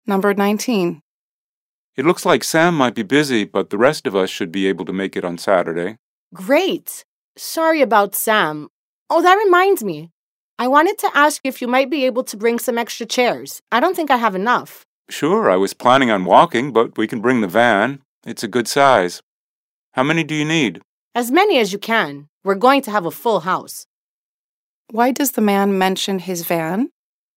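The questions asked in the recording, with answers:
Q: Why does the man mention his van?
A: He can use it to bring the extra chairs she asked for.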